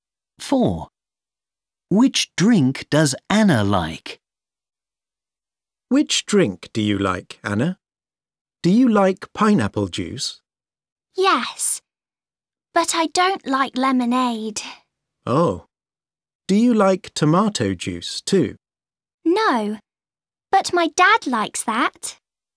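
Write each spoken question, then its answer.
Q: Which drink does Anna like?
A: pineapple juice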